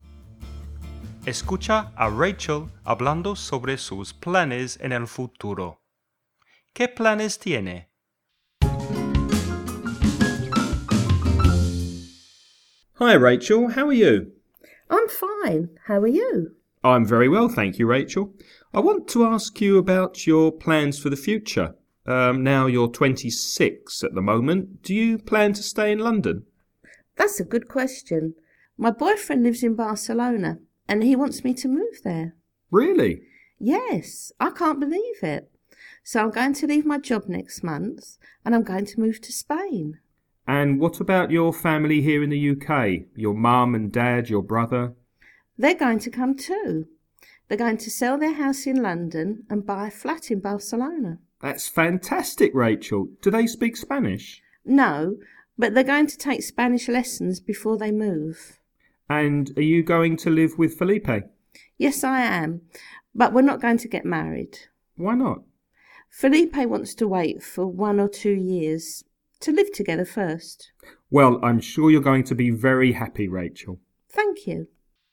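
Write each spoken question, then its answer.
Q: ¿Qué planes tiene?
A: Va a dejar su trabajo y mudarse a Barcelona (España) para vivir con su novio Felipe, pero no van a casarse todavía.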